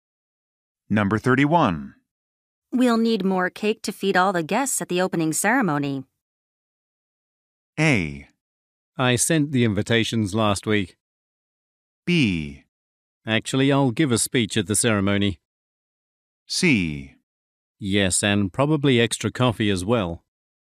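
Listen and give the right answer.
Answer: C: Yes, and probably extra coffee as well.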